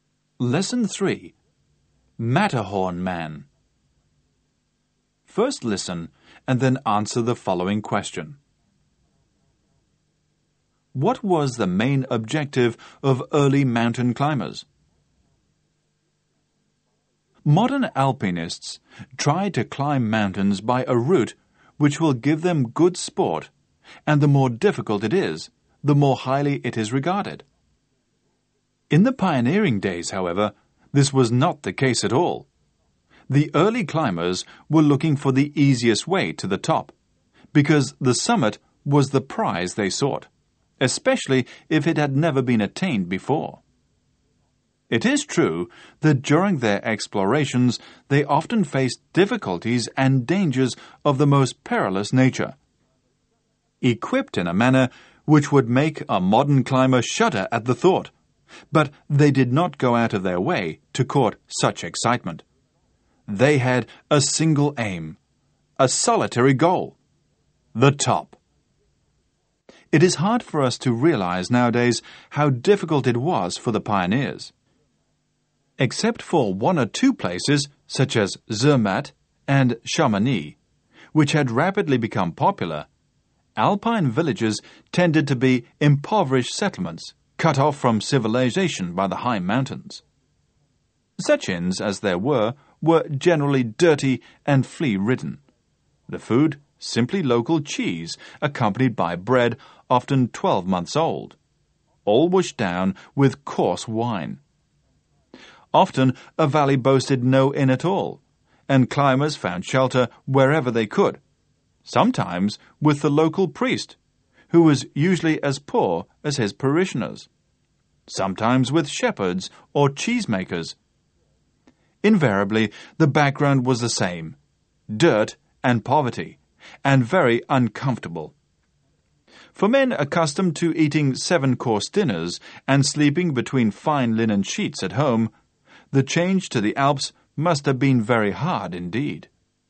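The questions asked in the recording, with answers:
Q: What was the main objective of early mountain climbers?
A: To reach the summit (the top) by the easiest way, especially if it had never been reached before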